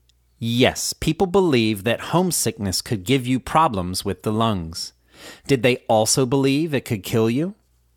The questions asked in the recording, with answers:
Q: Did they also believe it could kill you?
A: Yes, they also believed it could kill you.